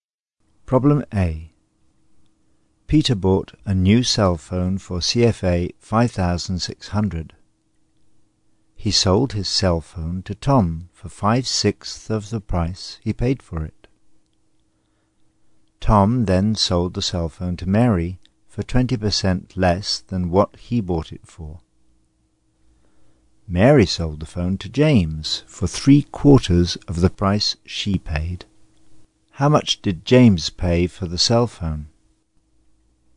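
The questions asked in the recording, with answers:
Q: How much did James pay for the cell phone?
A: CFA 2,800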